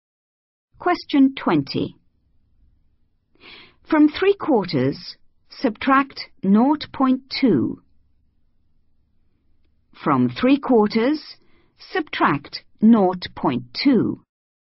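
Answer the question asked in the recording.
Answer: 0.55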